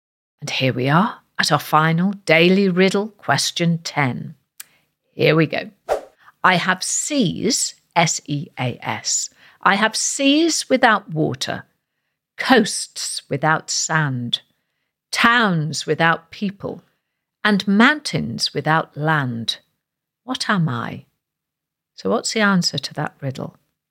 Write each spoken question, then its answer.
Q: I have seas without water, coasts without sand, towns without people, and mountains without land. What am I?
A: I am, one of my favourite things, a map, or of course, a globe.